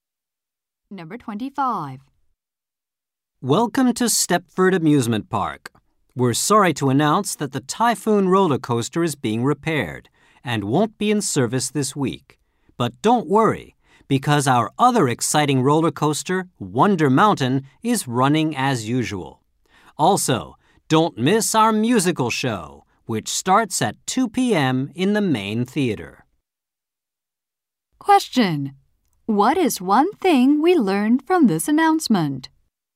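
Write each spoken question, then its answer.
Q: What is one thing we learned from this announcement?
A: The Typhoon roller coaster is being repaired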